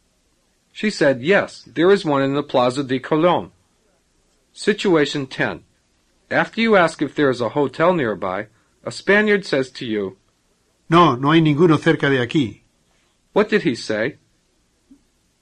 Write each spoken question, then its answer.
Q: What did he say?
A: He said, no, there isn't one near here.